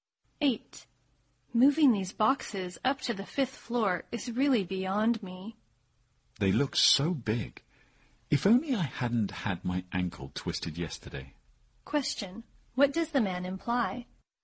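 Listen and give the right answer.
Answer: He can't move the boxes because he twisted his ankle.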